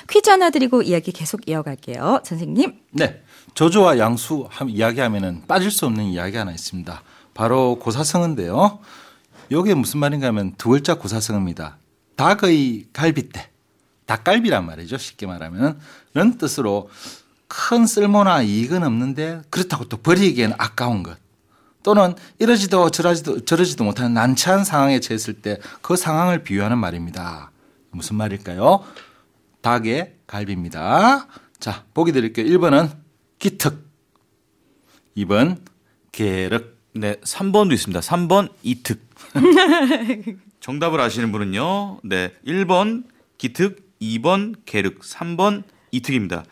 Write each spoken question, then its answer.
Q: 무슨 말일까요? 닭의 갈비입니다.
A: 정답은 2번 계륵이죠.